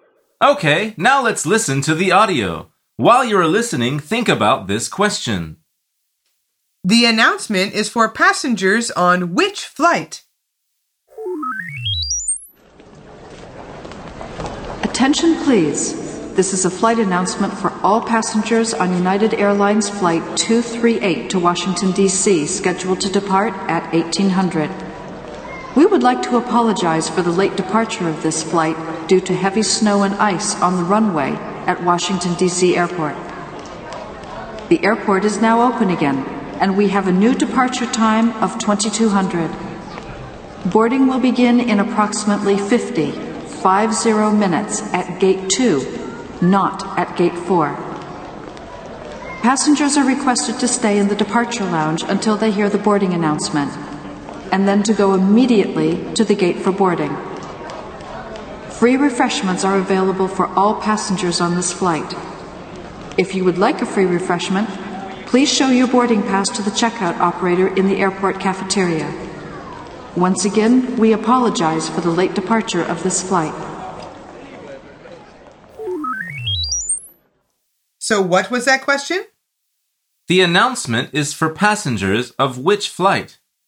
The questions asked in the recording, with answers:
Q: The announcement is for passengers of which flight?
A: The answer is Flight 238 to Washington, D.C.